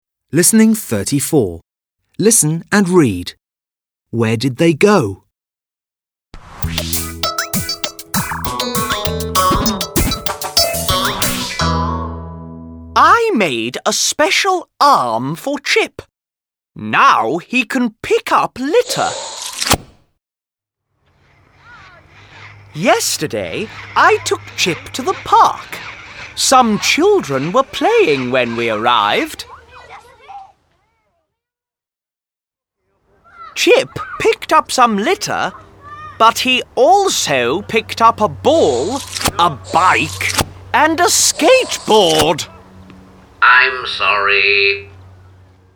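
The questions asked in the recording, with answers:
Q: Where did they go?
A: To the park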